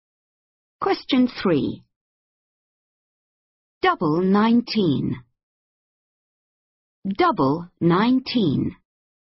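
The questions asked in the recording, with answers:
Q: Double 19.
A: 38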